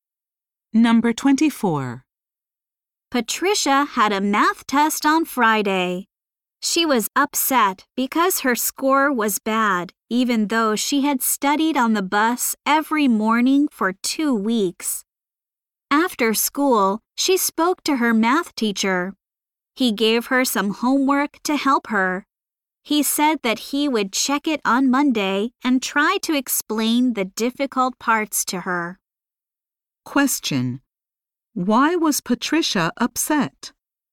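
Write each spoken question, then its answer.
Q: Why was Patricia upset?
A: She got a bad score on her math test.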